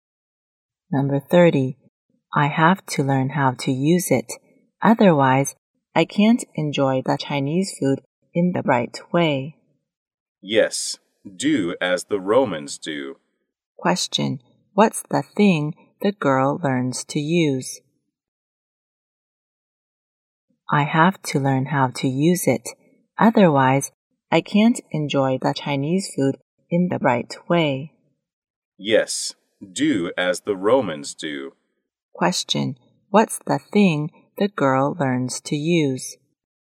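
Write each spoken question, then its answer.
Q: What's the thing the girl learns to use?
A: Chopsticks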